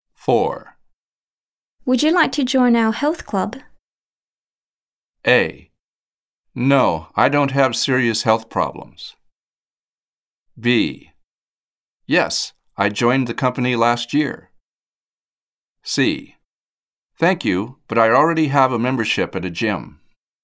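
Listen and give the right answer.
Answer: C: Thank you, but I already have a membership at a gym.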